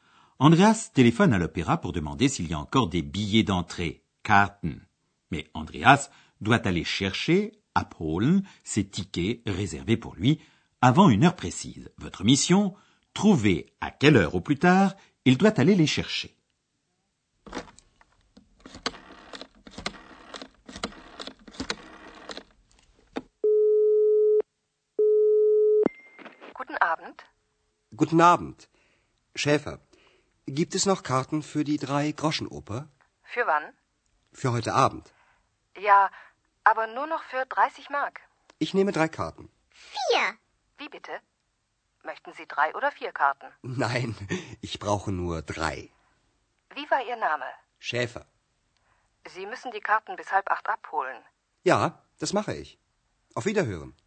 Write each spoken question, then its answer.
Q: trouver à quelle heure au plus tard il doit aller les chercher.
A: Andreas doit aller chercher ses billets jusqu'à 7h30.